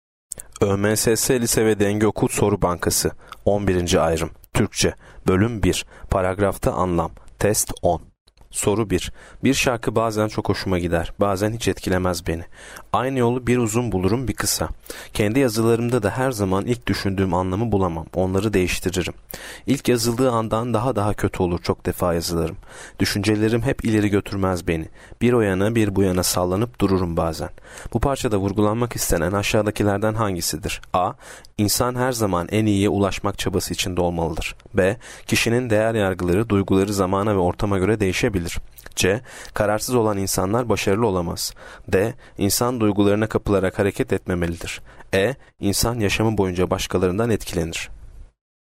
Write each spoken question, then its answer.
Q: Bu parçada vurgulanmak istenen aşağıdakilerden hangisidir?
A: Yanıt B. Kişinin değer yargıları, duyguları zamana ve ortama göre değişebilir.